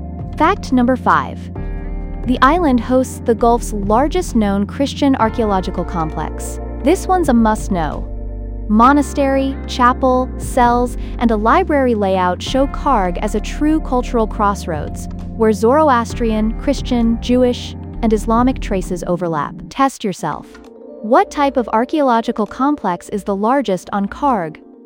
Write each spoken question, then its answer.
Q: What type of archaeological complex is the largest on Karg?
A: Correct answer. Christian memory aid.